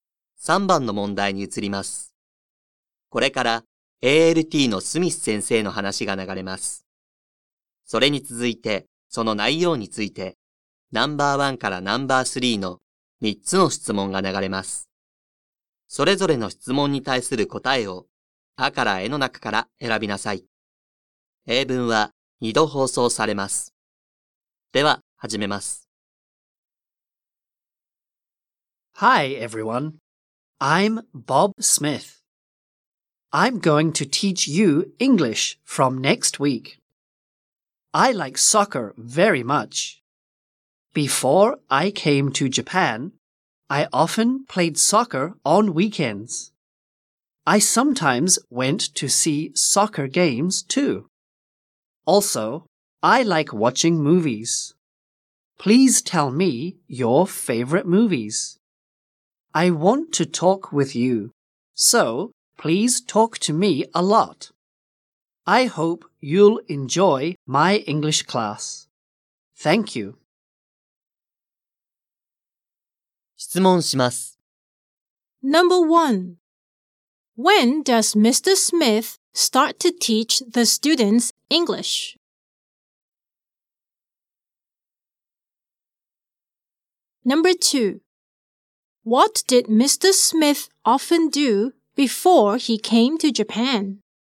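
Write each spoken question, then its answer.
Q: When does Mr. Smith start to teach the students English?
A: From next week

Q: What did Mr. Smith often do before he came to Japan?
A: He played soccer on weekends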